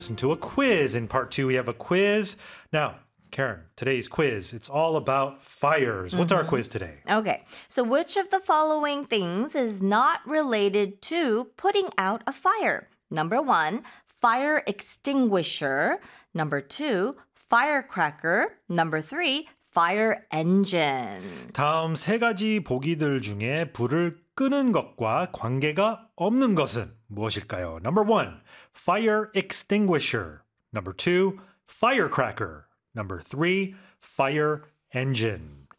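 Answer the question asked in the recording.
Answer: 2: firecracker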